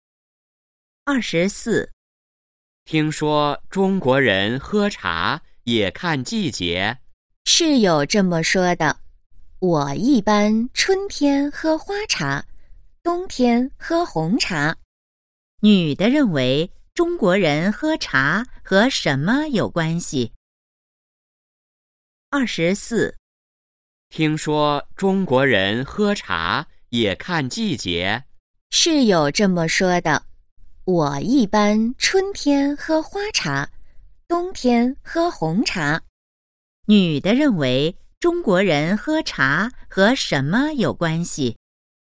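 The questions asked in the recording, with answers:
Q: 女的认为中国人喝茶和什么有关系?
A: 季节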